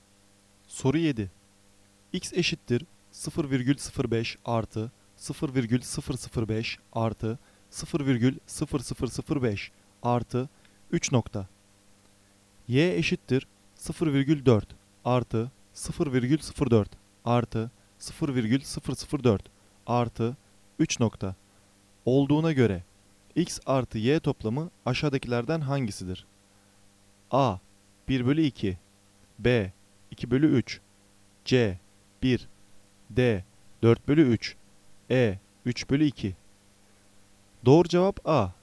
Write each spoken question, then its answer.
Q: Olduğuna göre x artı y toplamı aşağıdakilerden hangisidir?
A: Doğru cevap A.